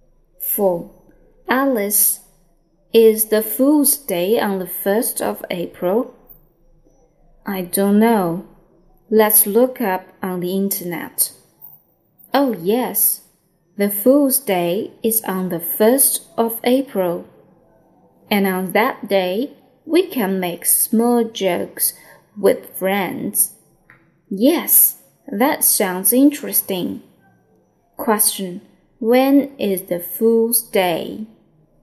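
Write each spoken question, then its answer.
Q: When is the Fool's Day?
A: On the 1st of April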